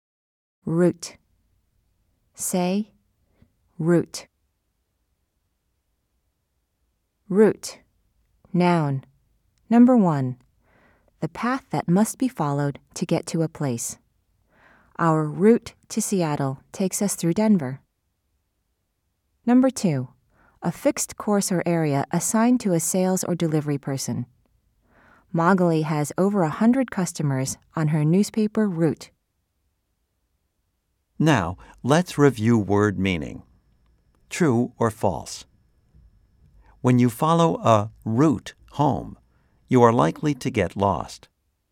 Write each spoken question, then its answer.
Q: True or false? When you follow a route home, you are likely to get lost.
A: If you said false, you are right.